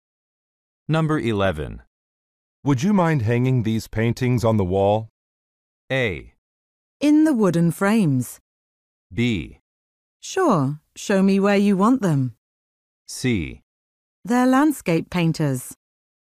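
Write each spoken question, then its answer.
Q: Would you mind hanging these paintings on the wall?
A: B: Sure, show me where you want them.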